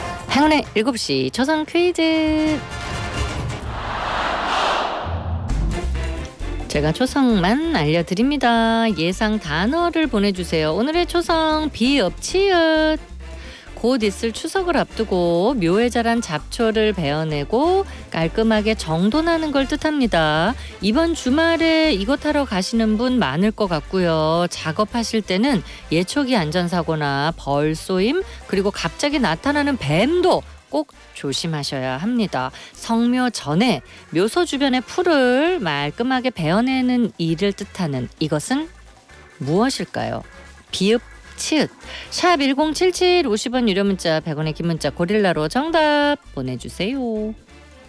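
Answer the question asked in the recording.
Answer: 벌초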